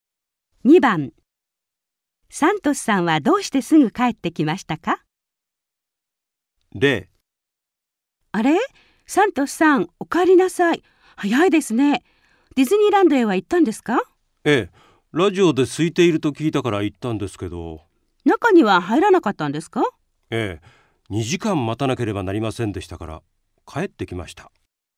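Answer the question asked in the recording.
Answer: 2時間待たなければならなかったから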